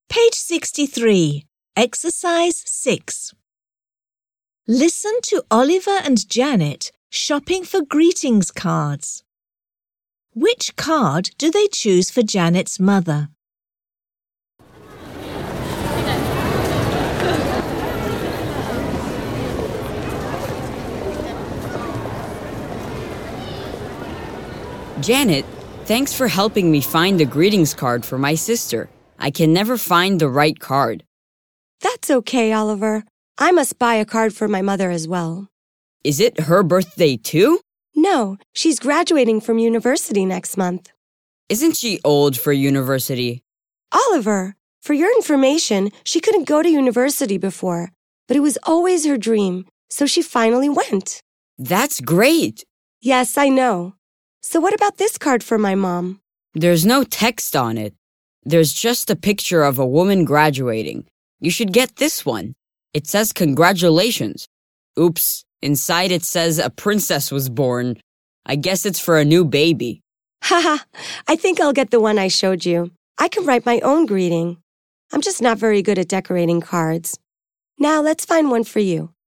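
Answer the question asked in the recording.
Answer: The card with no text and a picture of a woman graduating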